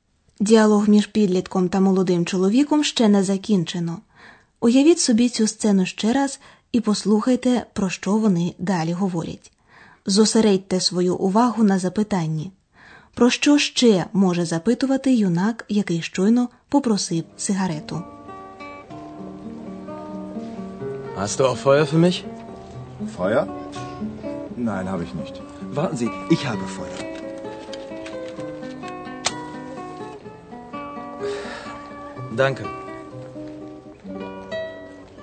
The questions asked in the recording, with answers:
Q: Про що ще може запитувати юнак, який щойно попросив сигарету?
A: Щоб запалити сигарету, потрібен вогонь.